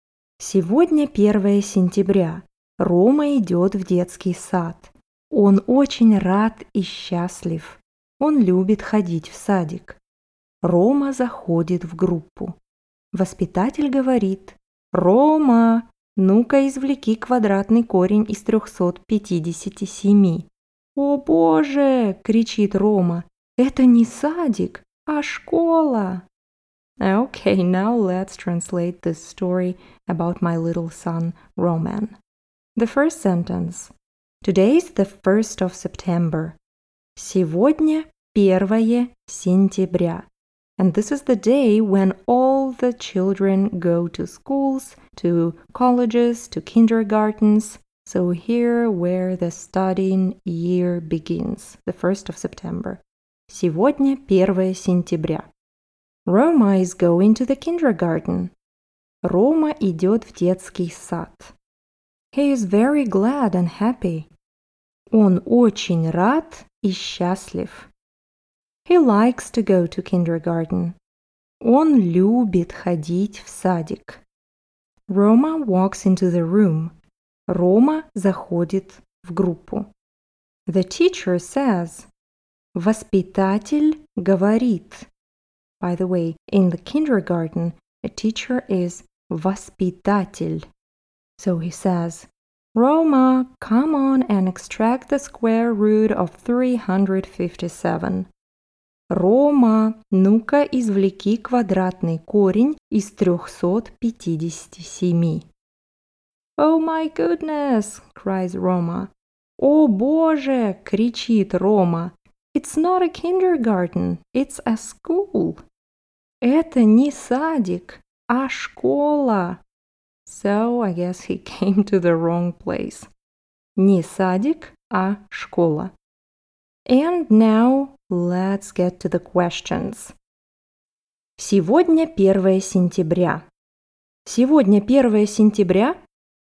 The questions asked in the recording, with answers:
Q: Сегодня 1 сентября?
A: Да, сегодня 1 сентября. Не второе, не третье.